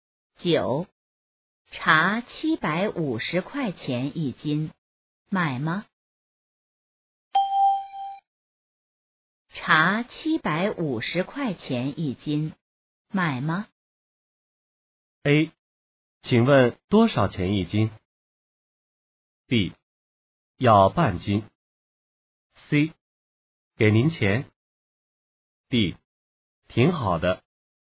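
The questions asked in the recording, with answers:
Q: 茶750块钱一斤,买吗?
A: B: 要半斤。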